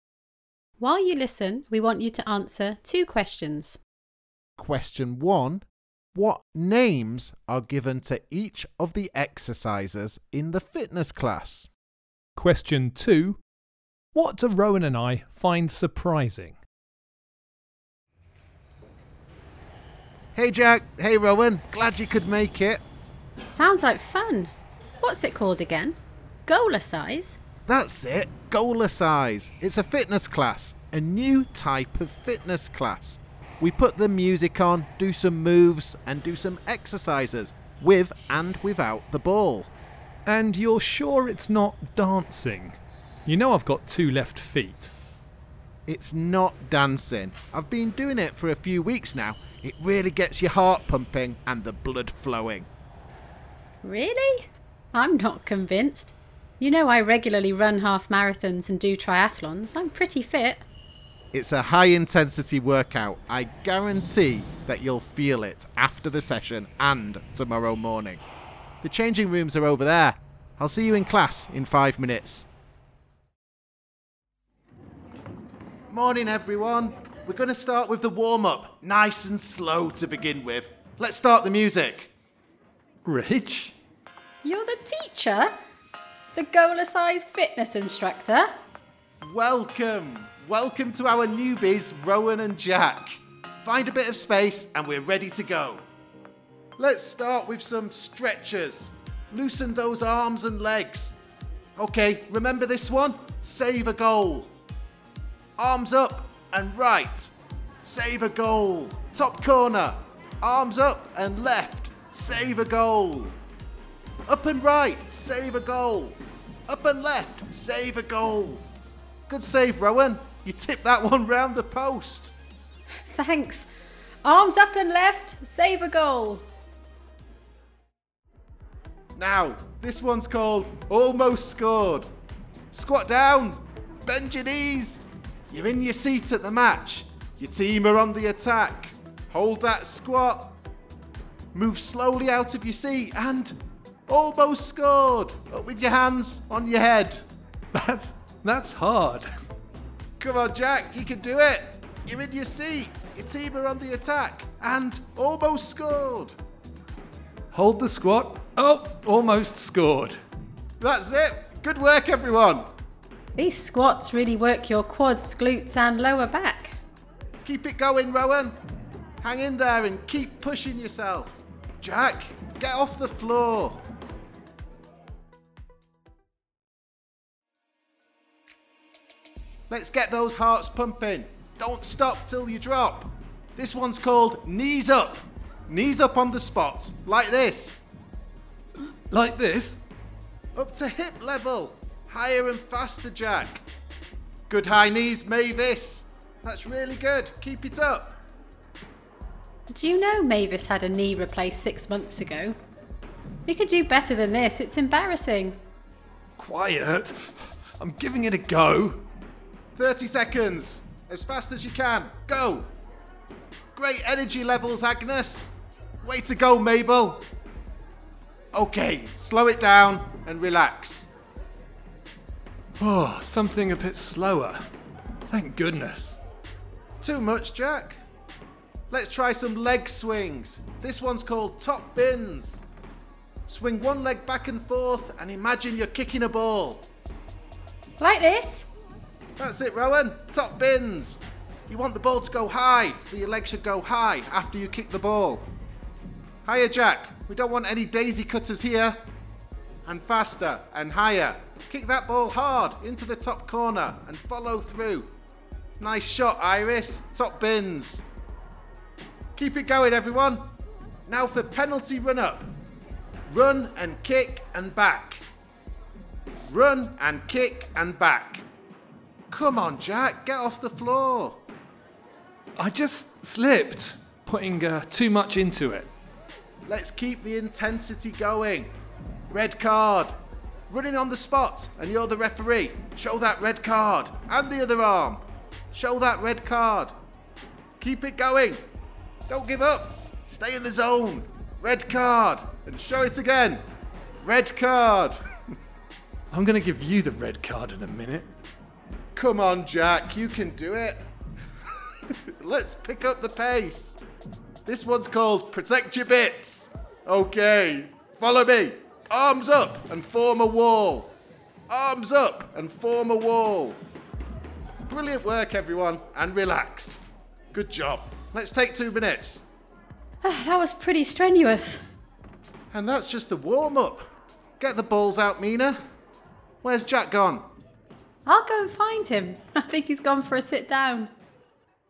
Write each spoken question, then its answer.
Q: Question one, what names are given to each of the exercises in the fitness class?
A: Save a goal. Almost scored.

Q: Question two, what do Rowan and I find surprising?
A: we were amazed to find out that Rich was the instructor.